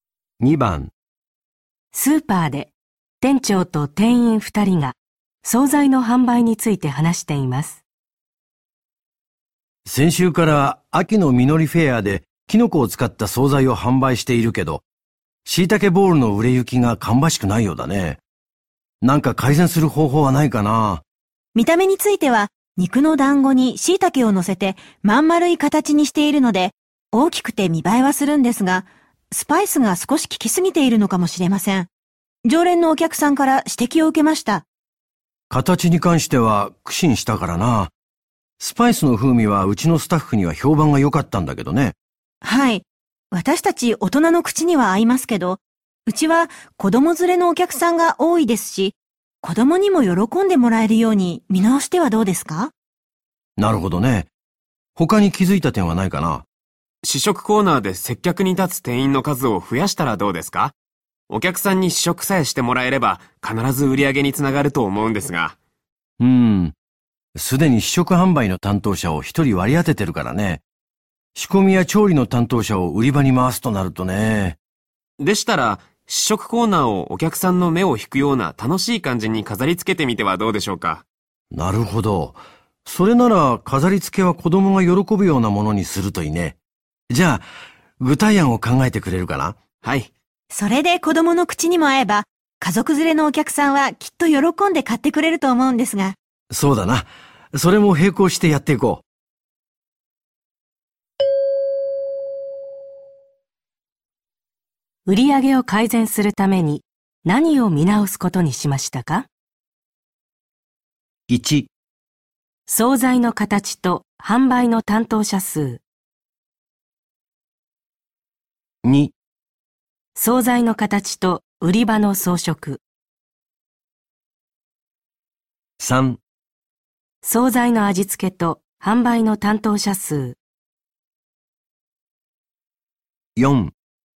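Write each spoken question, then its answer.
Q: 売上を改善するために何を見直すことにしましたか?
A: 4: 総菜の味付けと売り場の装飾。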